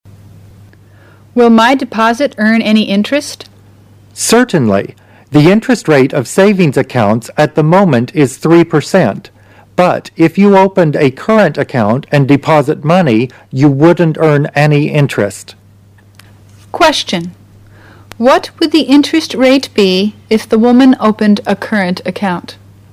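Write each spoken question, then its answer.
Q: What would the interest rate be if the woman opened a current account?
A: No interest (0%)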